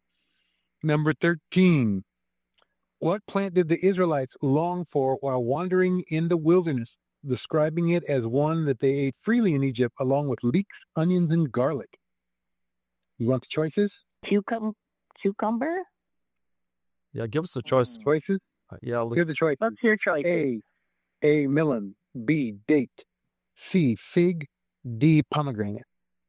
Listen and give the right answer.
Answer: Yes, it is melons.